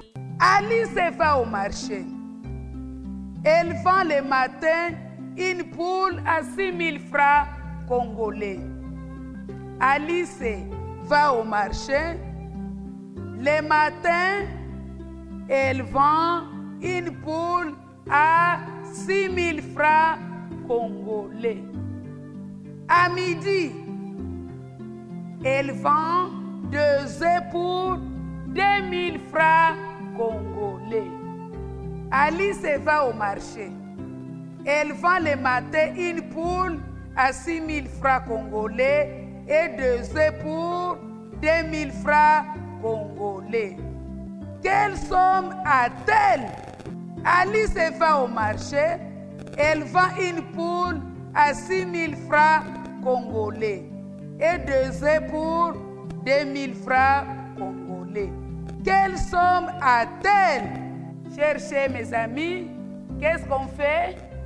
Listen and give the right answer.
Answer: La réponse égale 8000 francs congolais.